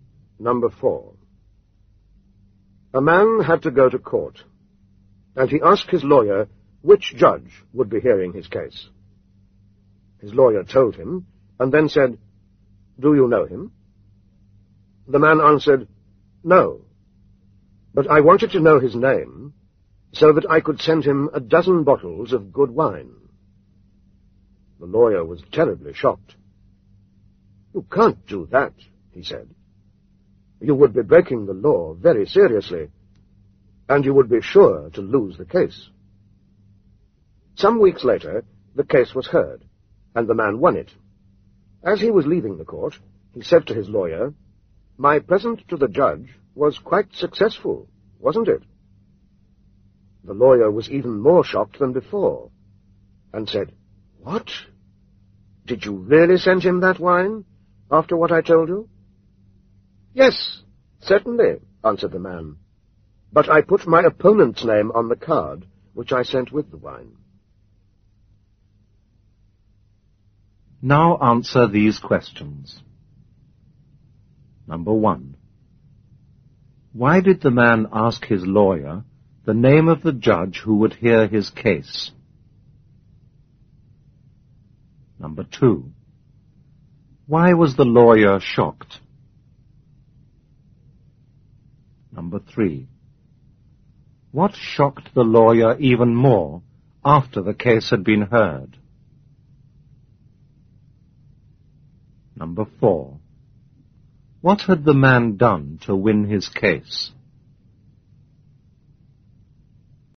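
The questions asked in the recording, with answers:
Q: Why did the man ask his lawyer the name of the judge who would hear his case?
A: Because he wanted to send the judge a dozen bottles of good wine.

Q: Why was the lawyer shocked?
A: Because sending the judge wine would be seriously breaking the law and would lose him the case.

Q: What shocked the lawyer even more after the case had been heard?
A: The man said he had really sent the wine to the judge.

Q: What had the man done to win his case?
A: He sent the wine with his opponent's name on the card.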